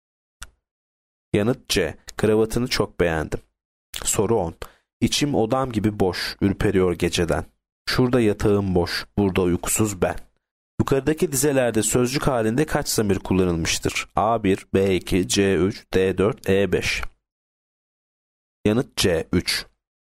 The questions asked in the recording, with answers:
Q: Yukarıdaki dizelerde sözcük halinde kaç zamir kullanılmıştır?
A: Yanıt C3.